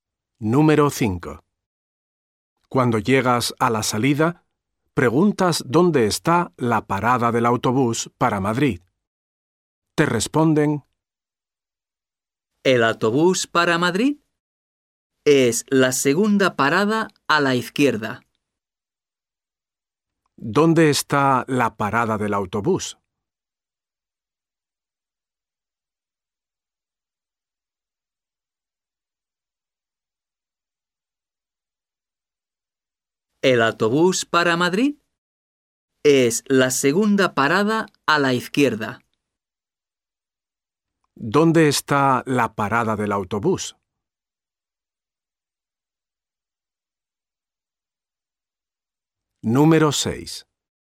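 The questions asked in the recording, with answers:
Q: ¿Dónde está la parada del autobús?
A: La segunda parada a la izquierda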